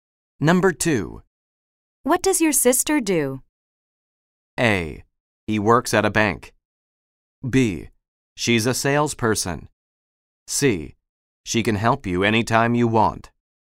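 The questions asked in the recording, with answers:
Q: What does your sister do?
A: B: She's a salesperson.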